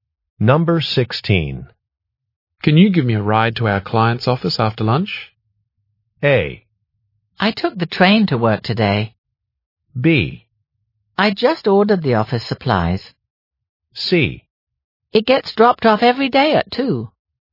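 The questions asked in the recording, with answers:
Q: Can you give me a ride to our client's office after lunch?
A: A: I took the train to work today.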